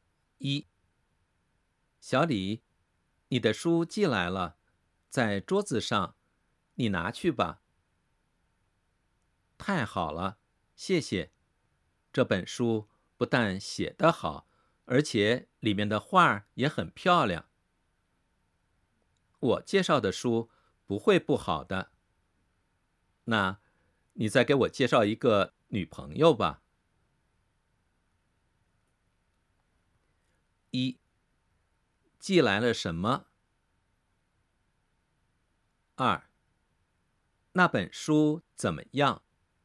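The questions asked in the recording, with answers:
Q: 那本书怎么样?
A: 写得好,里面的画也很漂亮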